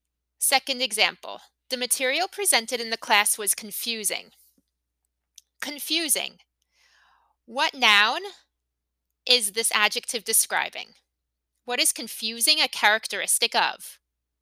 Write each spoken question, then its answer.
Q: What is confusing a characteristic of?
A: That's right, material.